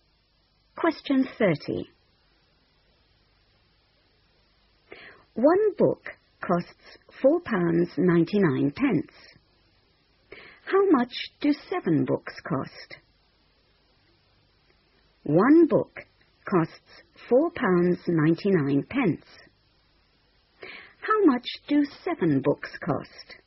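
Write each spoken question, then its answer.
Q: One book costs £4.99. How much do 7 books cost?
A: £34.93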